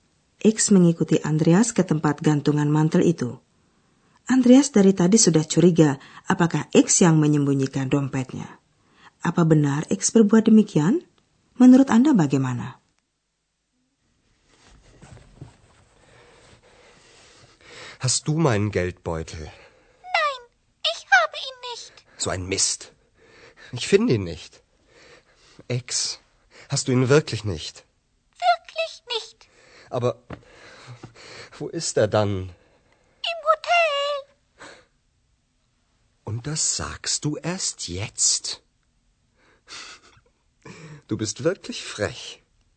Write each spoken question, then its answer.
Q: Apa benar X berbuat demikian?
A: Memang benar, X tidak menyembunyikan dompet Andreas, akan tetapi X melihat dompet itu ketinggalan di hotel dan dia tidak memberitahu Andreas.